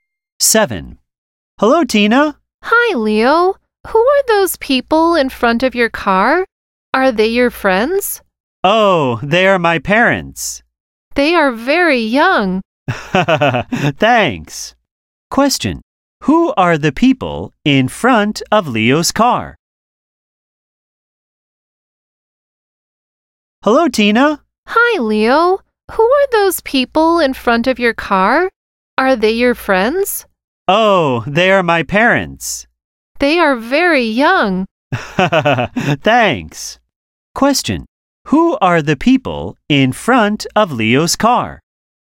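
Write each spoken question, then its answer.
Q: Who are the people in front of Leo's car?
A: His parents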